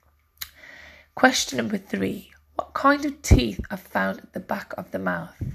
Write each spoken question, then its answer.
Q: What kind of teeth are found at the back of the mouth?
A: And the answer is molars.